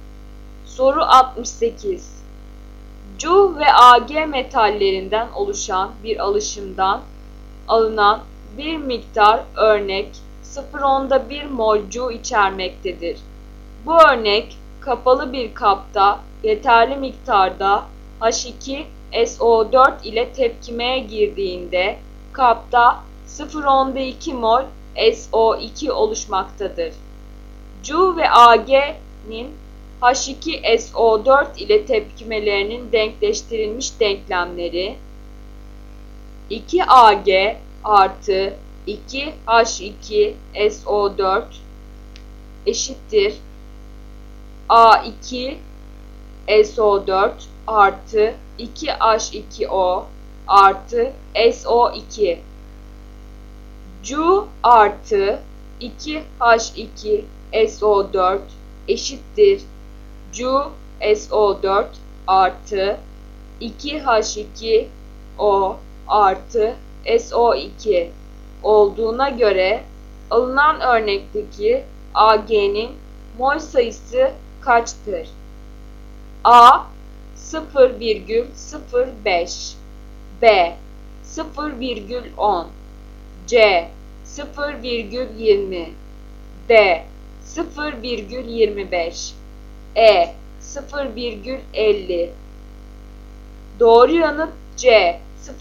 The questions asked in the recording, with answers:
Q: 2H2O artı SO2 olduğuna göre alınan örnekteki Ag'nin mol sayısı kaçtır?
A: Doğru yanıt C.